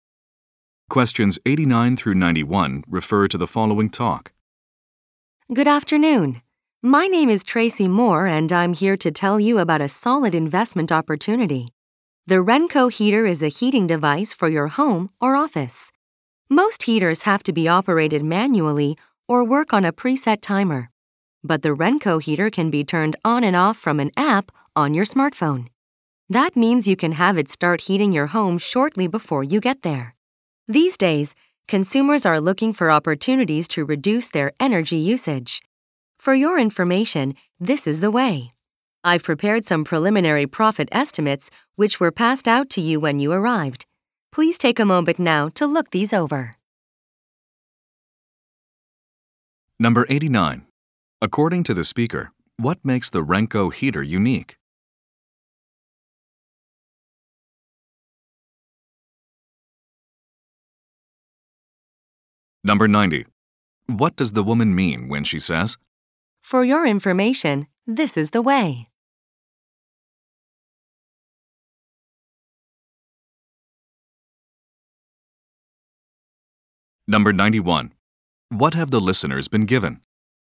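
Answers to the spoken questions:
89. It can be turned on and off from a smartphone app
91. Preliminary profit estimates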